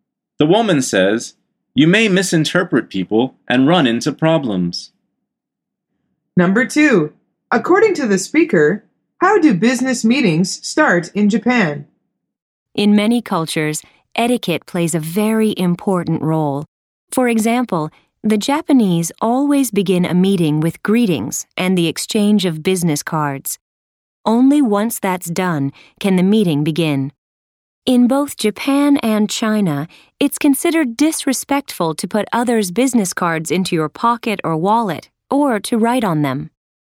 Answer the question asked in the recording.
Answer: The answer is with greetings and the exchange of business cards.